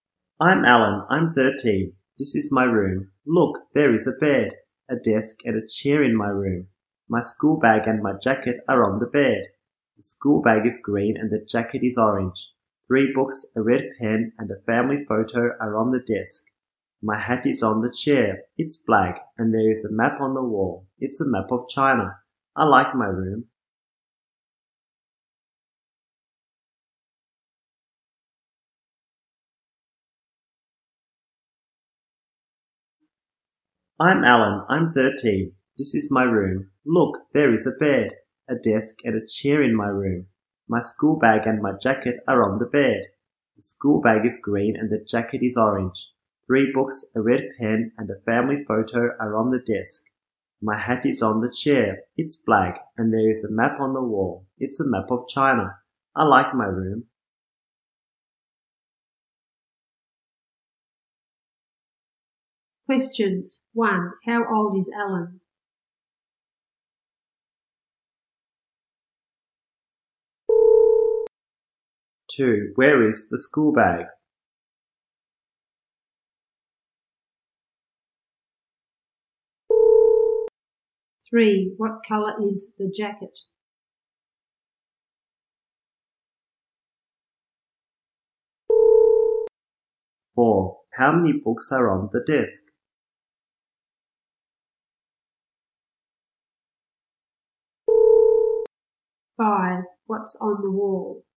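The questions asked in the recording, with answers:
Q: How old is Alan?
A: 13

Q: Where is the school bag?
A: On the bed

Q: What color is the jacket?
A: Orange

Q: How many books are on the desk?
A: Three

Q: What's on the wall?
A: A map of China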